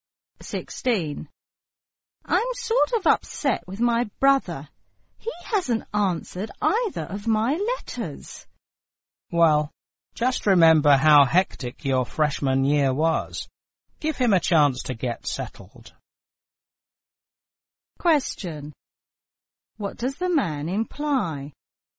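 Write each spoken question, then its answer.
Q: What does the man imply?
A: The brother is probably busy adjusting to his first year at college, so the woman should be patient.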